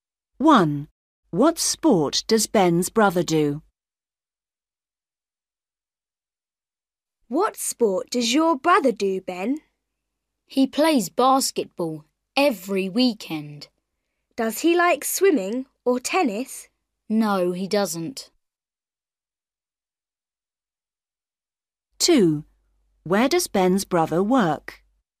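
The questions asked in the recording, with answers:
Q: What sport does Ben's brother do?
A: basketball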